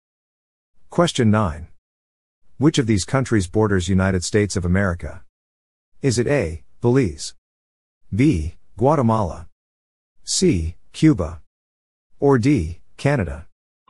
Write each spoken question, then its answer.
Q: Which of these countries borders United States of America?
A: The answer is D, Canada.